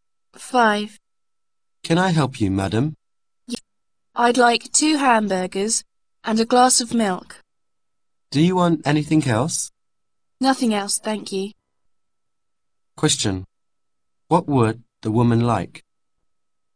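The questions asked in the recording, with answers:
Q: What would the woman like?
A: 2 hamburgers and a glass of milk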